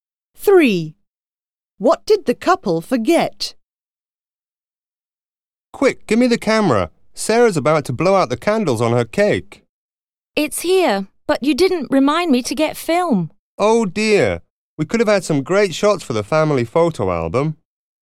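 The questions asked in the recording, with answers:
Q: What did the couple forget?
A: Film for the camera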